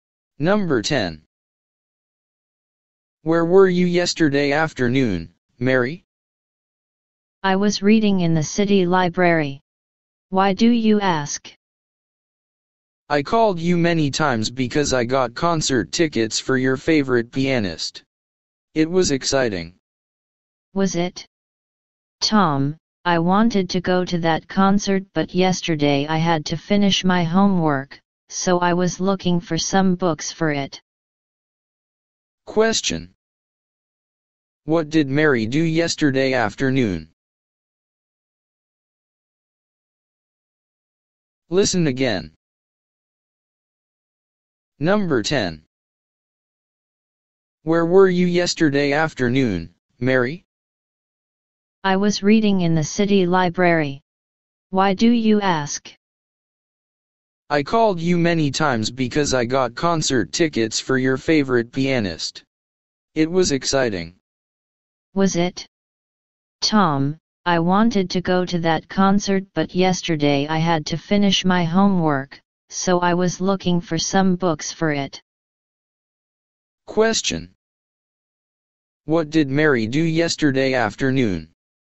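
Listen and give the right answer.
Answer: She was in the city library, reading and looking for books for her homework.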